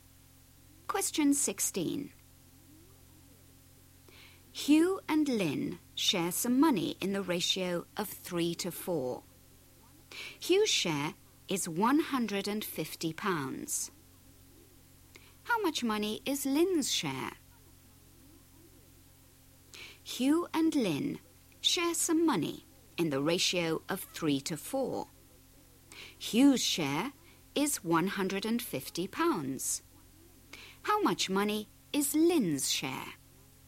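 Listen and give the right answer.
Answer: £200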